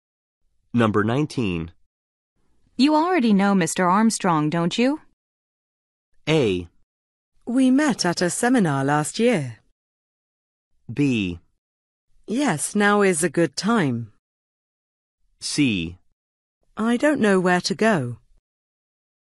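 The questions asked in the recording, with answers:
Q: You already know Mr. Armstrong, don't you?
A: A: We met at a seminar last year.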